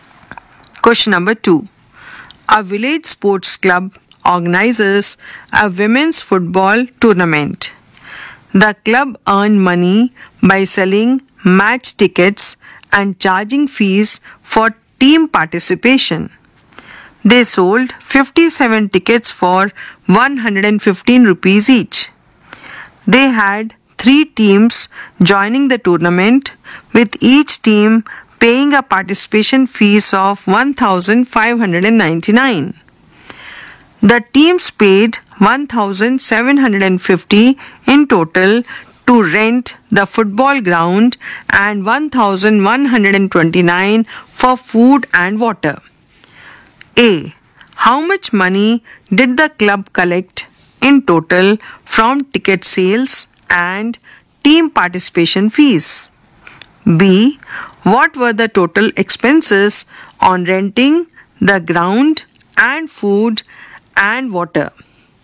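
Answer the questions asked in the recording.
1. 11352 rupees
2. 2879 rupees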